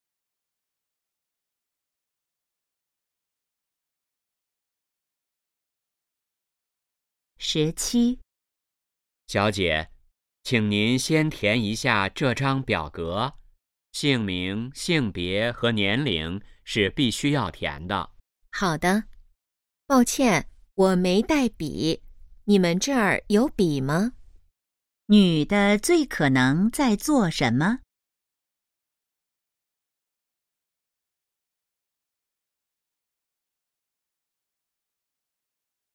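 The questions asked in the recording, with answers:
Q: 女的最可能在做什么?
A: 填表格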